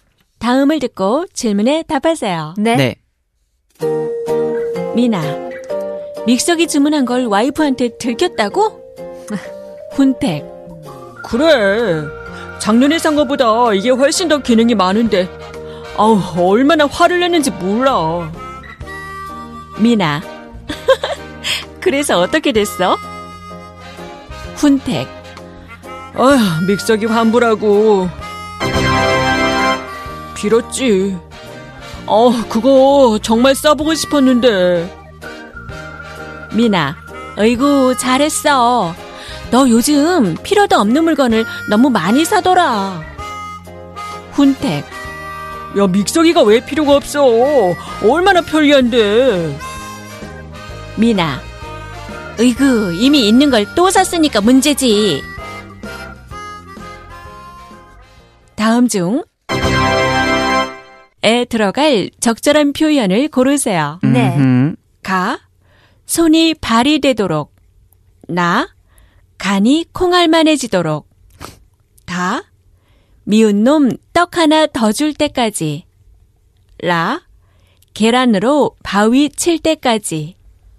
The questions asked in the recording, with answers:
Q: 다음 중 에 들어갈 적절한 표현을 고르세요.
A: That is the answer that we chose.